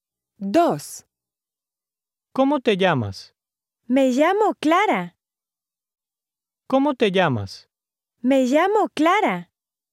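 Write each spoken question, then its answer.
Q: ¿Cómo te llamas?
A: A: logical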